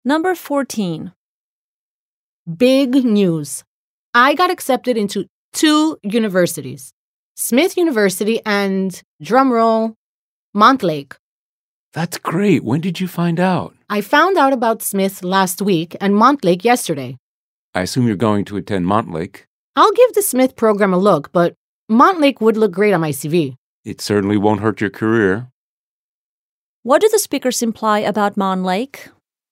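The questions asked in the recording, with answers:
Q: What do the speakers imply about Montlake?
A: It is more prestigious and would help the speaker's career.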